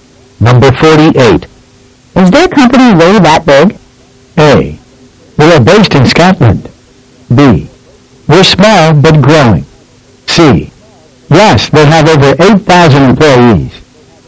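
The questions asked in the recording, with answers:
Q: Is their company really that big?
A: C: Yes, they have over 8,000 employees.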